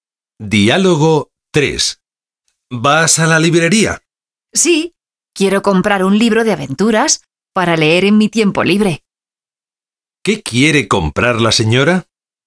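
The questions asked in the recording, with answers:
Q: ¿Qué quiere comprar la señora?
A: Un libro de aventuras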